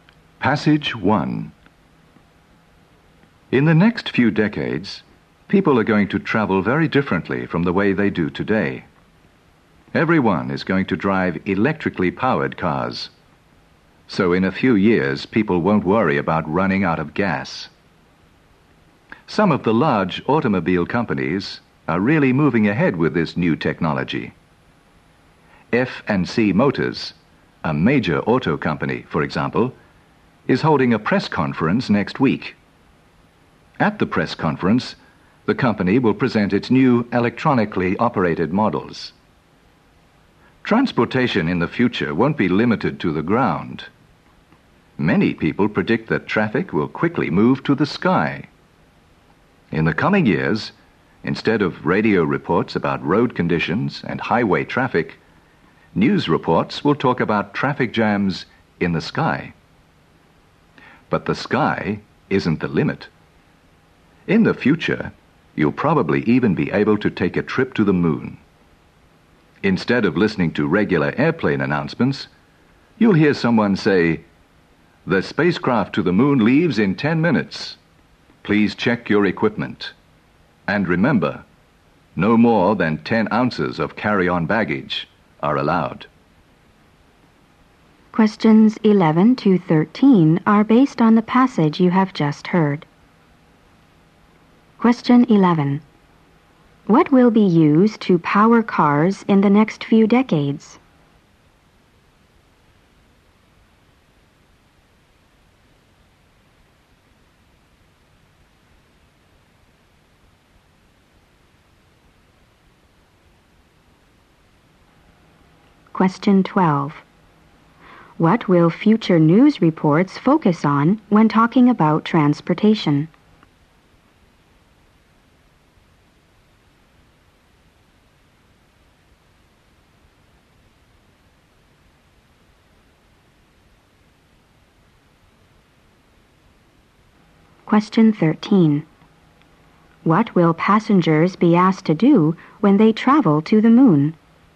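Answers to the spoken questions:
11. Electricity
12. Traffic jams in the sky
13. Check their equipment and carry no more than 10 ounces of carry-on baggage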